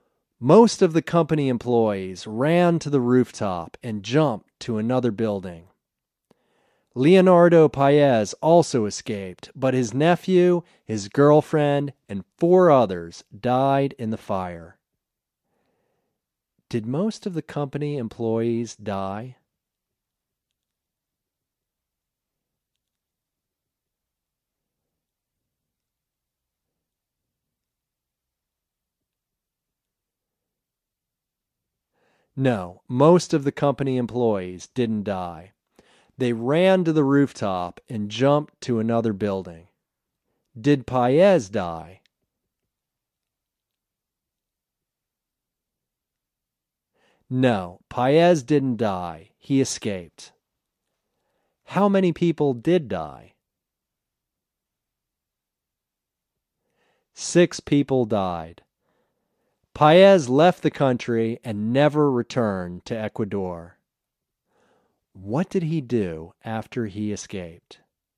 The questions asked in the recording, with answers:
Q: Did most of the company employees die?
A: No, most of the company employees didn't die.

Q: Did Paez die?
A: No, Paez didn't die. He escaped.

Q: How many people did die?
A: Six people died.

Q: What did he do after he escaped?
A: He left the country and never returned to Ecuador.